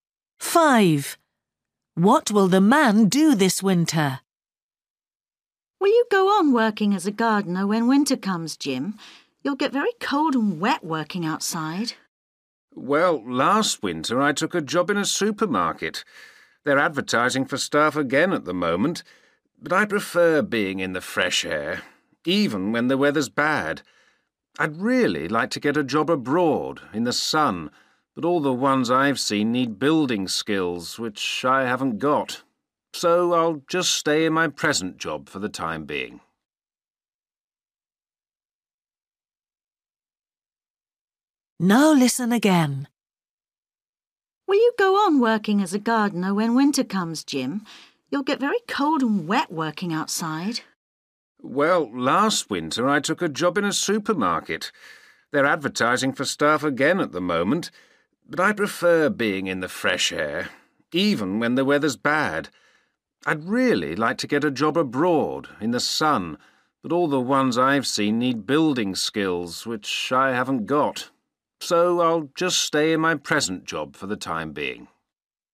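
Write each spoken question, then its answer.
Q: What will the man do this winter?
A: Keep working as a gardener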